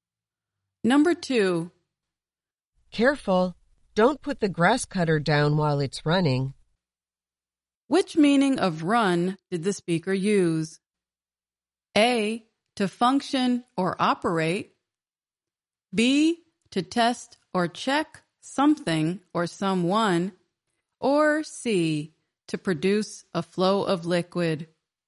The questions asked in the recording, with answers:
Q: Which meaning of run did the speaker use?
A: The answer is A, to function or operate.